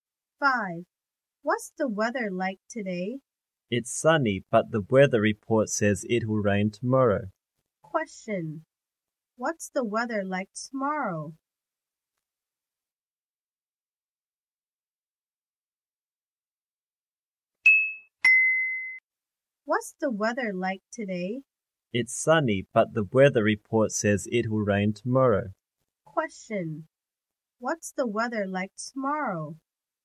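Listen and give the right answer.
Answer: It will be rainy.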